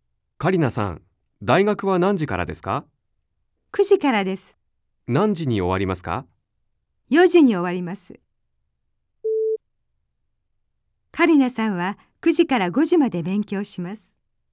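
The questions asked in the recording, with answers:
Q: カリナさんは9時から5時まで勉強します。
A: ×(4時に終わります)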